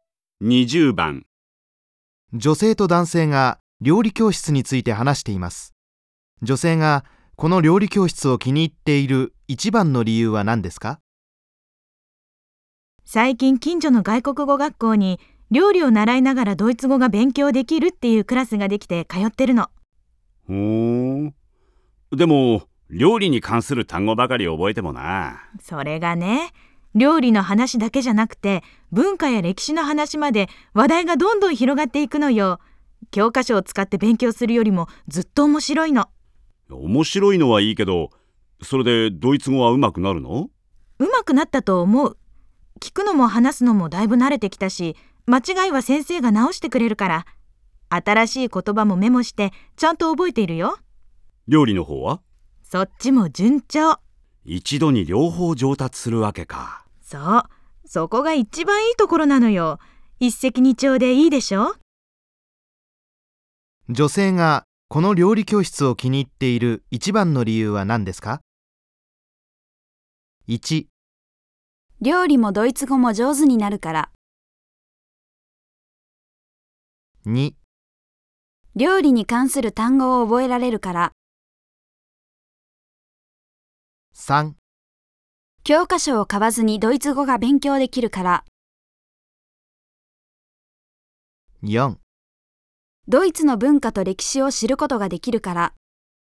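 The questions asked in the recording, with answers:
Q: 女性がこの料理教室を気に入っている一番の理由は何ですか?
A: 1: 料理もドイツ語も上手になるから。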